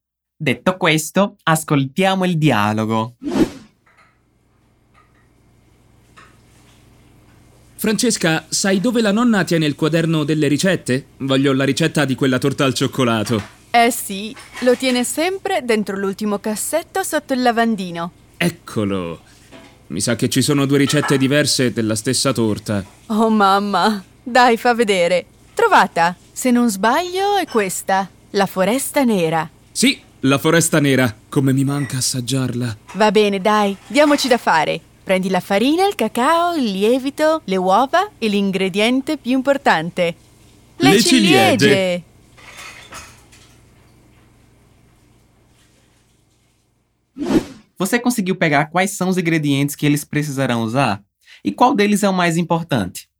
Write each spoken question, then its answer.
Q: Você conseguiu pegar quais são os ingredientes que eles precisarão usar?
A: prendi la farina, il cacau, il lievito, le uova

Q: E qual deles é o mais importante?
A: L'ingrediente più importante, le ciliegie